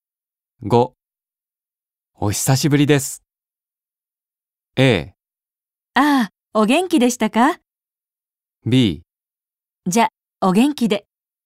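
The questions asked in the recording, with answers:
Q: お久しぶりです。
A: A: ああ、お元気でしたか?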